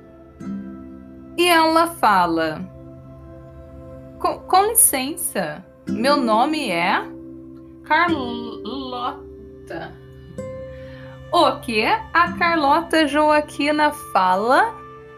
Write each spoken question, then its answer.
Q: O que a Carlota Joaquina fala?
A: Ela fala: Com licença, o meu nome é Carlota.